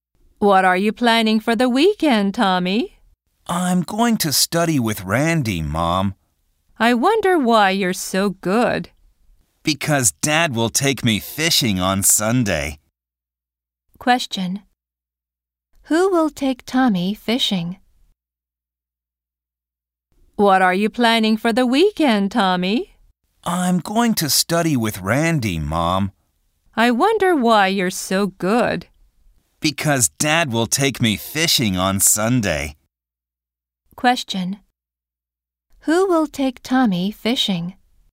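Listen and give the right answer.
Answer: His dad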